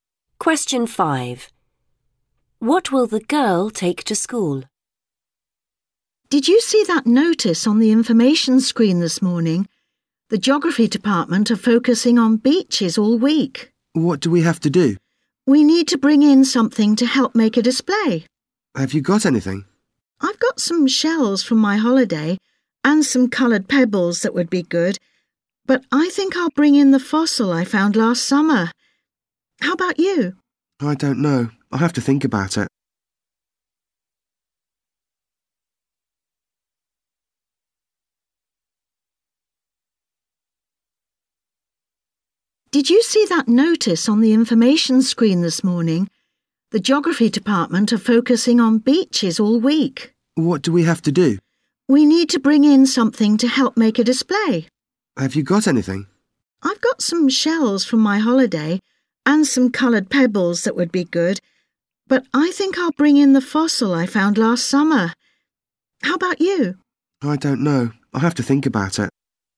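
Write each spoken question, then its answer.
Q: What will the girl take to school?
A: A fossil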